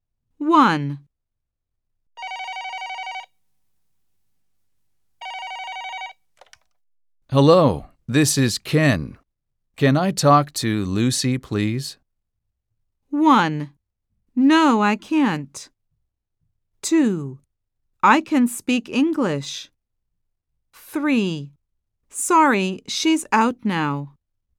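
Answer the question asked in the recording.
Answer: 3: Sorry, she's out now.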